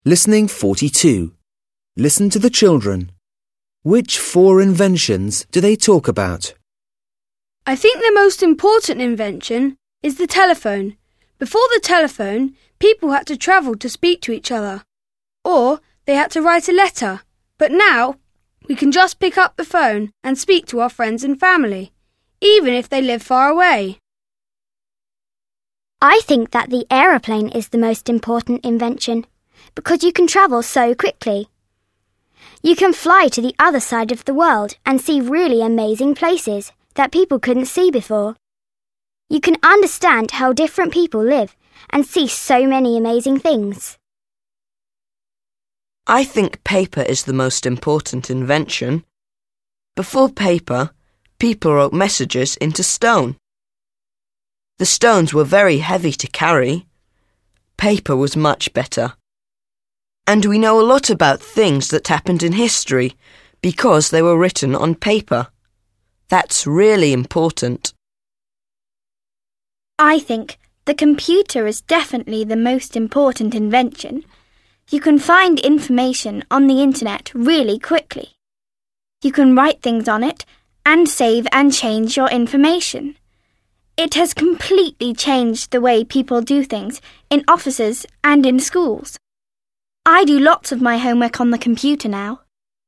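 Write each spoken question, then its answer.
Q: Which four inventions do they talk about?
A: the telephone, the airplane, paper and the computer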